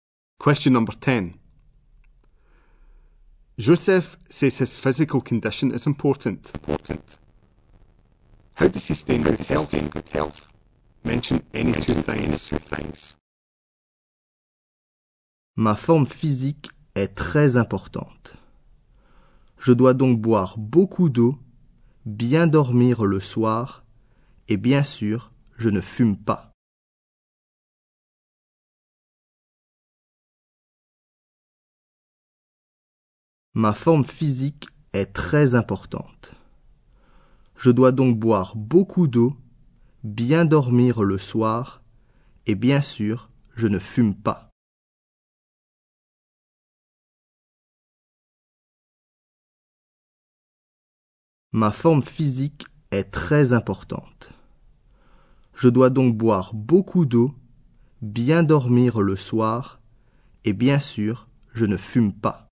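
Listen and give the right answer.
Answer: Drinks lots of water, sleeps well, doesn't smoke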